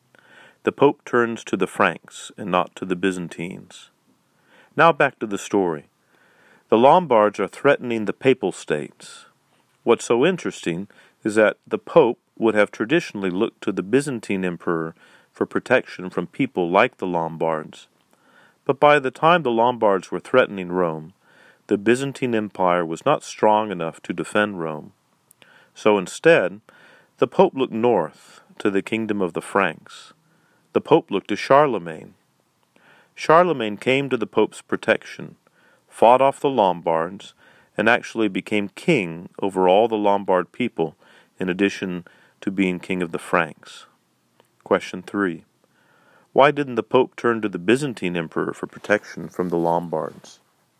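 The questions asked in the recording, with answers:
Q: Why didn't the Pope turn to the Byzantine Emperor for protection from the Lombards?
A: The Byzantine Empire was not strong enough to defend Rome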